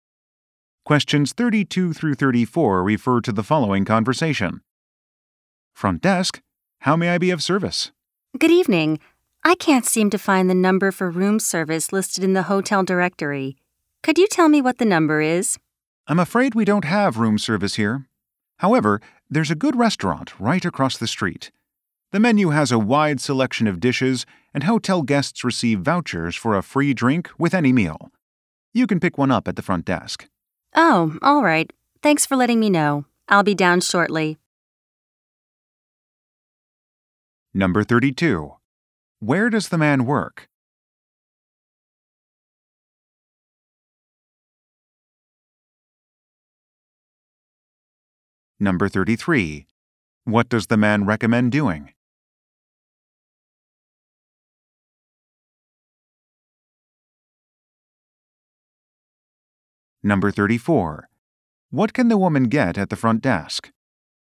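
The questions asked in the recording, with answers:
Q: Where does the man work?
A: At a hotel front desk

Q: What does the man recommend doing?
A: Eating at the restaurant across the street

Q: What can the woman get at the front desk?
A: A voucher for a free drink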